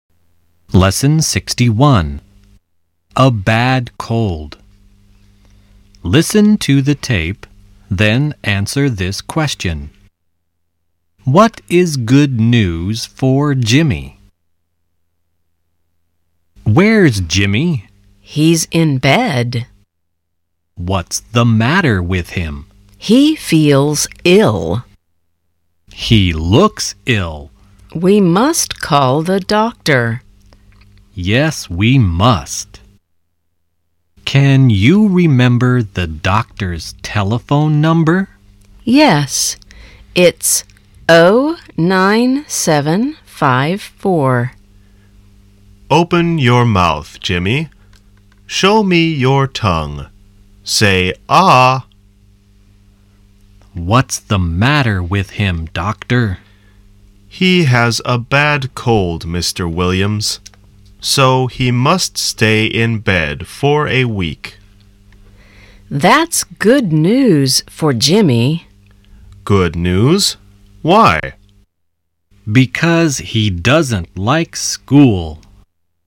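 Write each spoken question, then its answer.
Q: What is good news for Jimmy?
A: He must stay in bed for a week, so he doesn't have to go to school (he doesn't like school).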